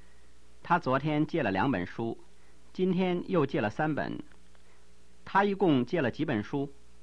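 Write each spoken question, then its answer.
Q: 他一共借了几本书?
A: 五本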